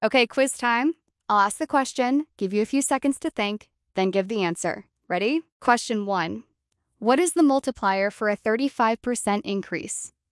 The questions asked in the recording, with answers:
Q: What is the multiplier for a 35% increase?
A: The answer is 1.35.